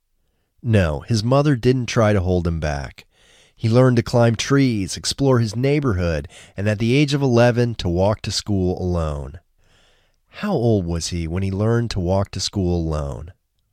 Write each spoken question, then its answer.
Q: How old was he when he learned to walk to school alone?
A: He was 11 when he learned to walk to school alone.